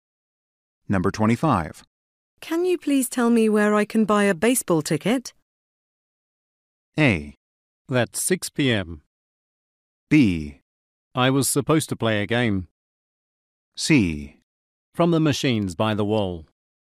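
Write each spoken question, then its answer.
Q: Can you please tell me where I can buy a baseball ticket?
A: C: From the machines by the wall.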